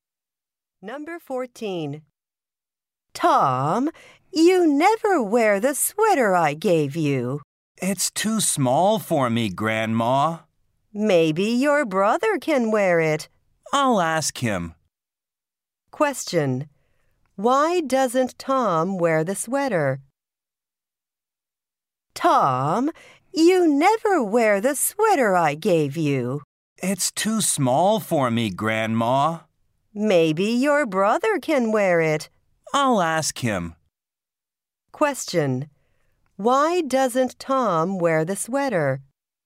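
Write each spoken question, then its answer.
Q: Why doesn't Tom wear the sweater?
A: It's too small for him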